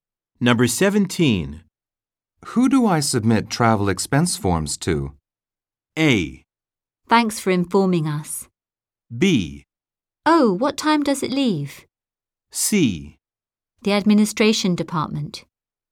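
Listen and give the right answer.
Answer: C: The Administration Department.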